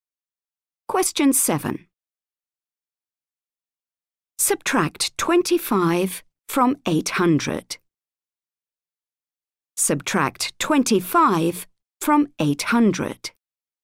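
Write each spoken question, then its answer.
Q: Subtract 25 from 800.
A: 775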